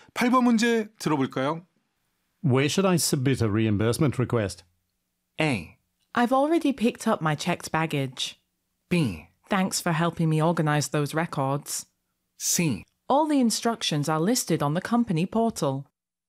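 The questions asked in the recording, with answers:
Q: Where should I submit a reimbursement request?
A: C: All the instructions are listed on the company portal.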